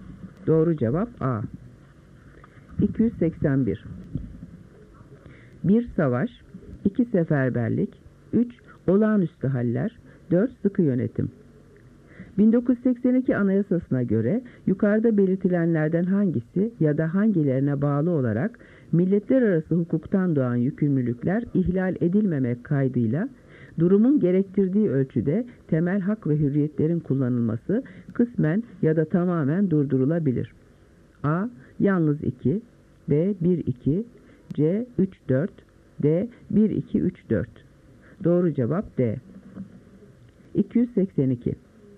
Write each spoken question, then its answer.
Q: 1982 Anayasası'na göre yukarıda belirtilenlerden hangisi ya da hangilerine bağlı olarak milletler arası hukuktan doğan yükümlülükler ihlal edilmemek kaydıyla durumun gerektirdiği ölçüde temel hak ve hürriyetlerin kullanılması kısmen ya da tamamen durdurulabilir.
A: Doğru cevap D.